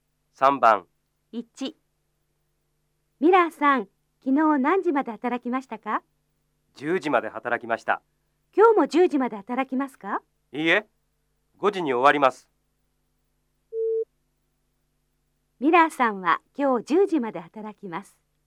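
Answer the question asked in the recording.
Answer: ×(いいえ、5時に終わります)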